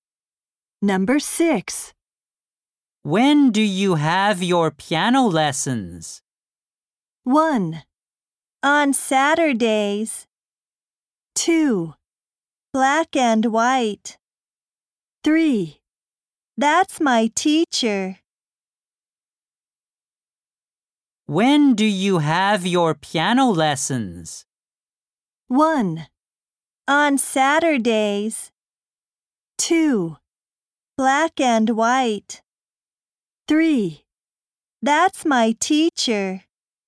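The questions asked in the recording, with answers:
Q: When do you have your piano lessons?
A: 1: On Saturdays.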